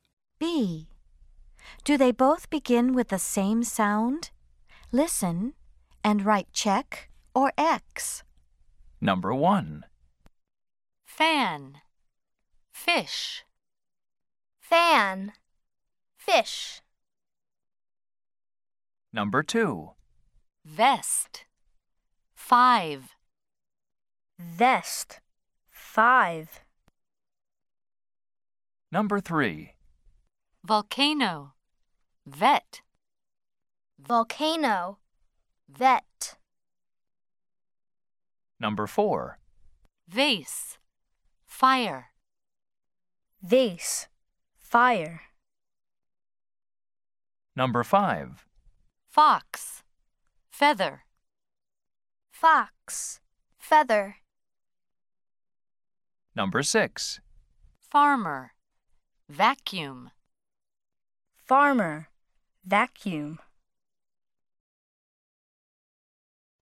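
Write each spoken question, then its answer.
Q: Do they both begin with the same sound?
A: Yes (check): fan, fish

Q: Do they both begin with the same sound?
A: No (X): vest, five

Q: Do they both begin with the same sound?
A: Yes (check): volcano, vet

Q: Do they both begin with the same sound?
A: No (X): vase, fire

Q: Do they both begin with the same sound?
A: Yes (check): fox, feather

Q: Do they both begin with the same sound?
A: No (X): farmer, vacuum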